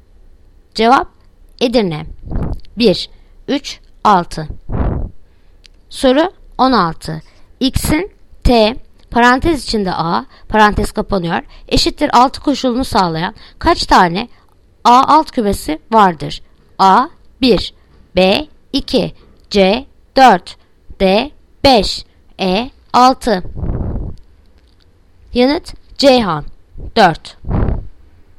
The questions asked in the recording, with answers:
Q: X'in T parantez içinde A parantez kapanıyor eşittir 6 koşulunu sağlayan kaç tane A alt kümesi vardır?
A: Yanıt Ceyhan 4.